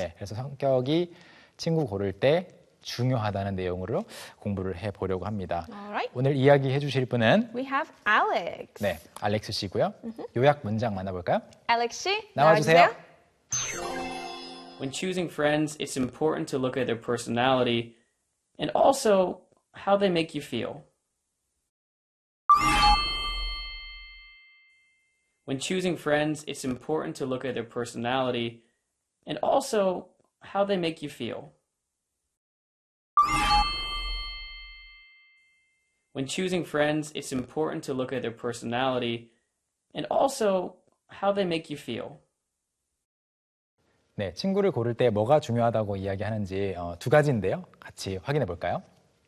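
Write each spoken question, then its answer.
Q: 친구를 고를 때 뭐가 중요하다고 이야기하는지 두 가지인데요.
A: 친구의 성격, 그리고 그 친구가 나를 어떤 기분이 들게 하는지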